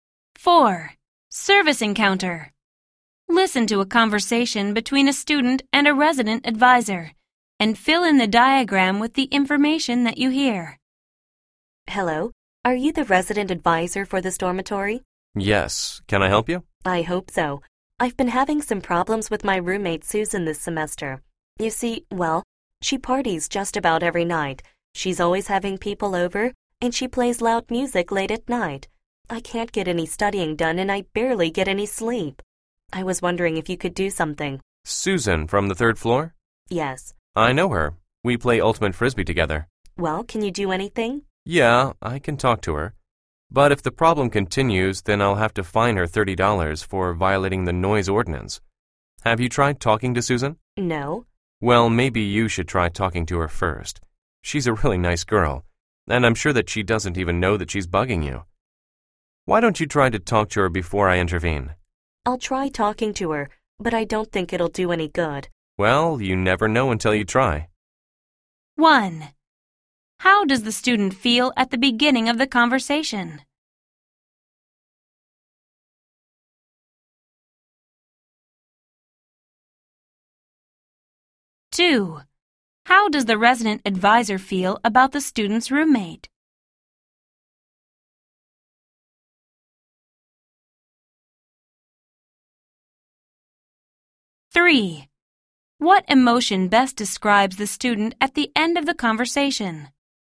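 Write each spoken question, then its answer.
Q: How does the student feel at the beginning of the conversation?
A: Frustrated and upset about her noisy roommate

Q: How does the resident advisor feel about the student's roommate?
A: She likes her and thinks she is a really nice girl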